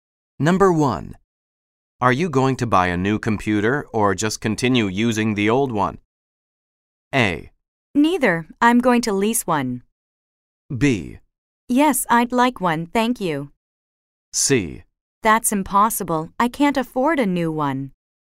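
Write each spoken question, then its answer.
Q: Are you going to buy a new computer or just continue using the old one?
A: A: Neither. I'm going to lease one.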